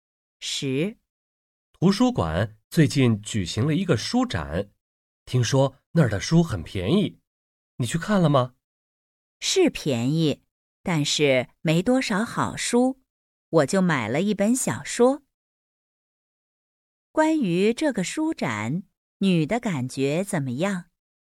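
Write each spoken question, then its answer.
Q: 关于这个书展,女的感觉怎么样?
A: 书便宜,但是没多少好书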